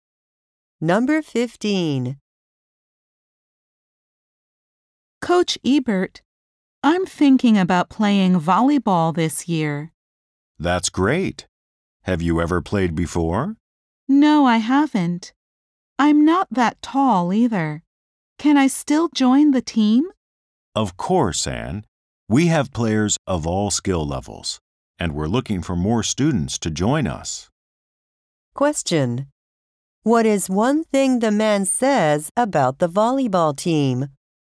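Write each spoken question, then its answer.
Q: What is one thing the man says about the volleyball team?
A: It has players of all skill levels and is looking for more students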